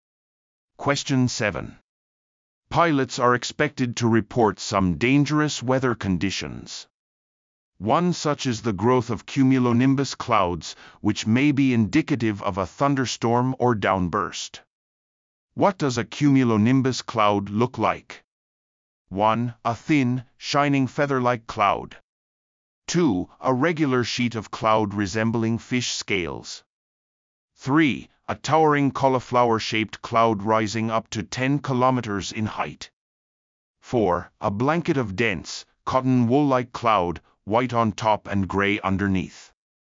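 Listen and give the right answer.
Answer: 3: A towering cauliflower-shaped cloud rising up to 10 kilometers in height.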